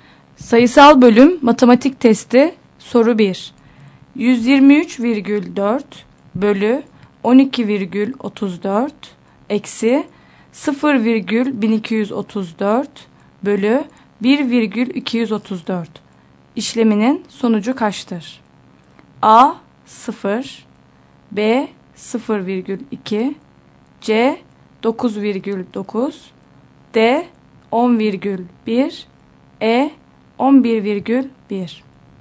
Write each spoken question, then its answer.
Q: 123,4 bölü 12,34 eksi 0,1234 bölü 1,234 işleminin sonucu kaçtır?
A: Doğru yanıt C şıkkı.